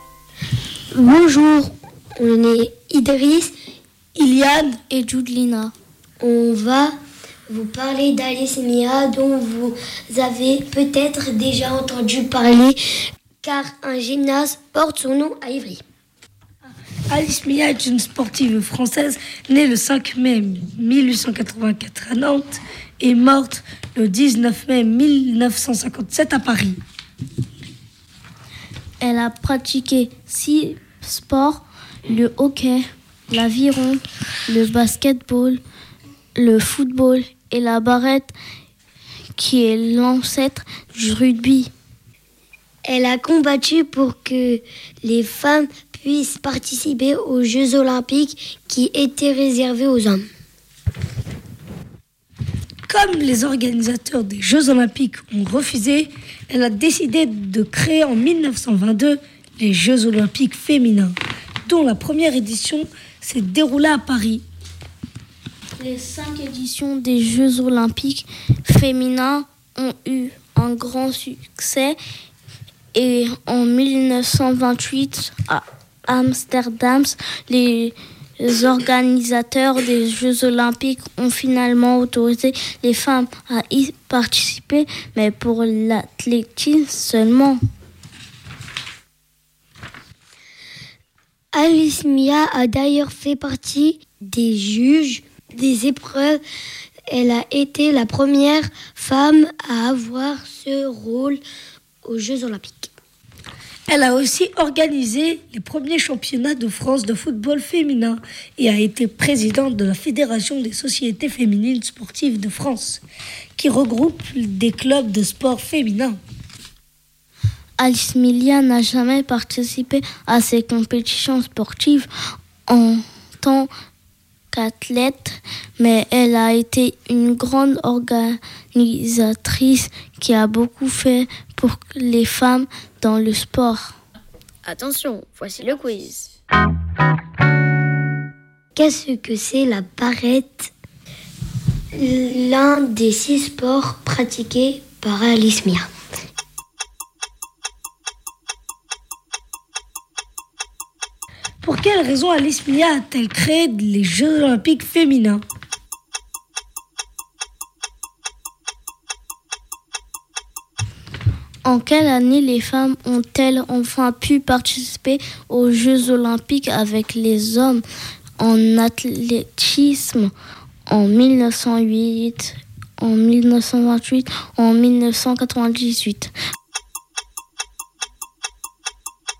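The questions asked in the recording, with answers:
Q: Pour quelle raison Alice Milia a-t-elle créé les Jeux Olympiques féminins?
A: Parce que les organisateurs des Jeux Olympiques refusaient que les femmes y participent

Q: En quelle année les femmes ont-elles enfin pu participer aux Jeux Olympiques avec les hommes en athlétisme?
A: En 1928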